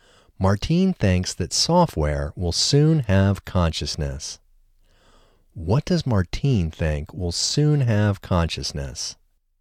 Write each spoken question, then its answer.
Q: What does Martine think will soon have consciousness?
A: Martine thinks software will soon have consciousness.